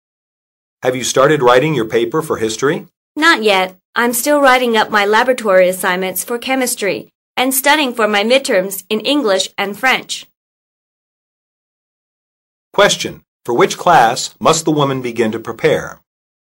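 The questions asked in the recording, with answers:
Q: For which class must the woman begin to prepare?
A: History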